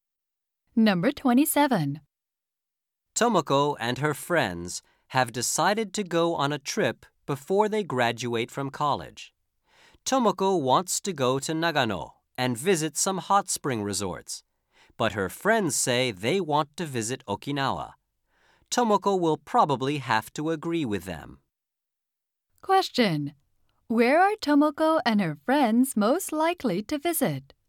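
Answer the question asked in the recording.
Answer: Okinawa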